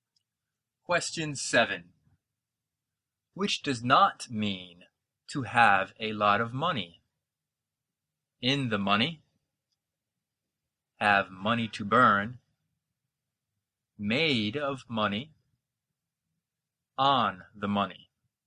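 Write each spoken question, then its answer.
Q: Which does not mean to have a lot of money?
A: D: on the money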